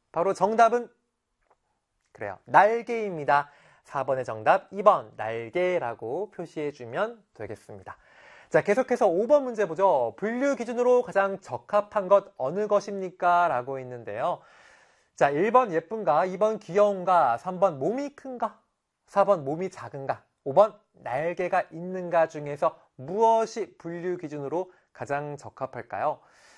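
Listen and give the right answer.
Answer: 5: 날개가 있는가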